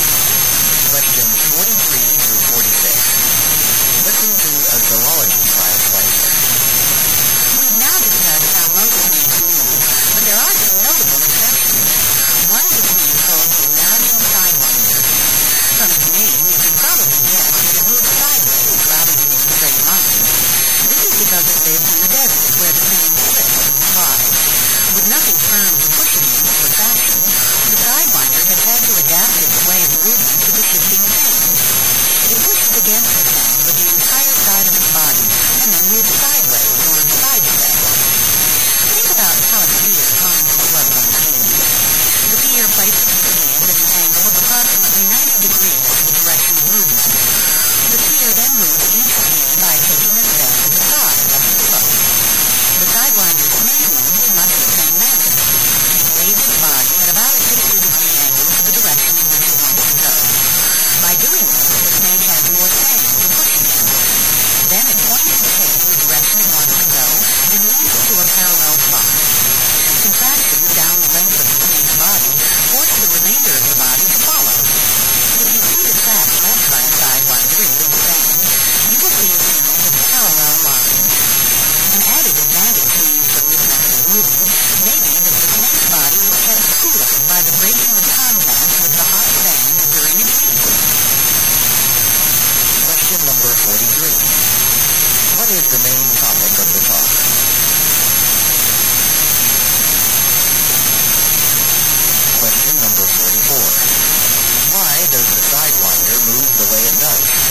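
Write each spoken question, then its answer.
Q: What is the main topic of the talk?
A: How the sidewinder snake moves

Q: Why does the Sidewinder move the way it does?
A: It lives in the desert, where shifting sand gives nothing firm to push against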